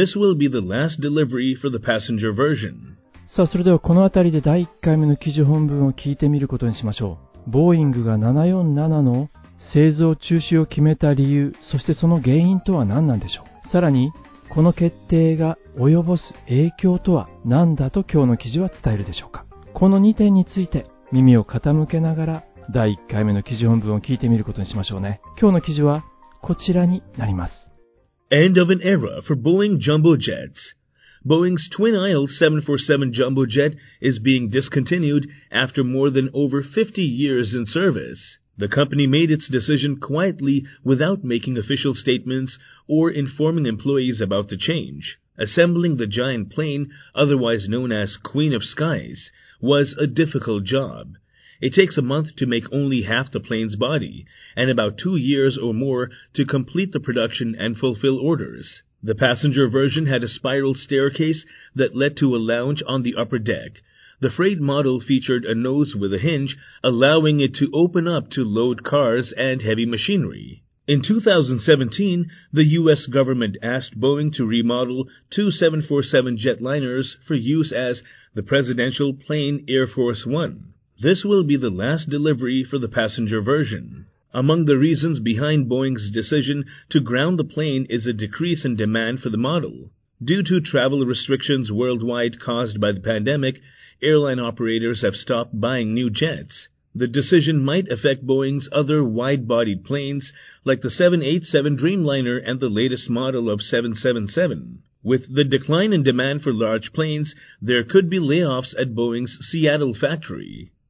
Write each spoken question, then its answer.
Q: ボーイングが747の製造中止を決めた理由、そしてその原因とは何なんでしょう。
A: Among the reasons behind Boeing's decision to ground the plane is a decrease in demand for the model.

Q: さらに、この決定が及ぼす影響とは何だと今日の記事は伝えるでしょうか。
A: The decision might affect Boeing's other wide-bodied planes, like the 787 Dreamliner and the latest model of 777.